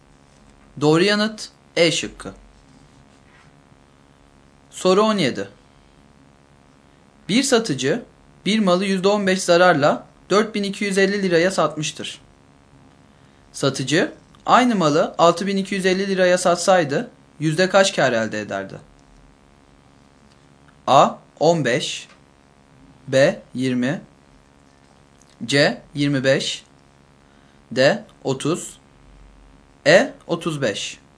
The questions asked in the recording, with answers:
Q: Satıcı aynı malı 6250 liraya satsaydı yüzde kaç kar elde ederdi?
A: Doğru yanıt C şıkkı.